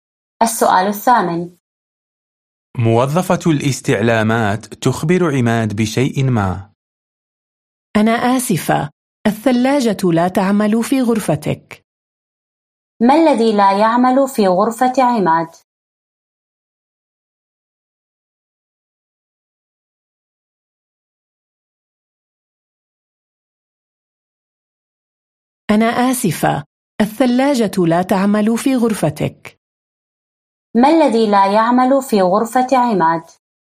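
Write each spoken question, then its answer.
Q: ما الذي لا يعمل في غرفة عماد؟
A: الثلاجة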